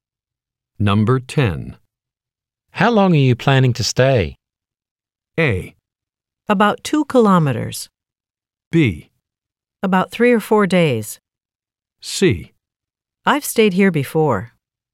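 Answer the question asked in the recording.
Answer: B: About 3 or 4 days.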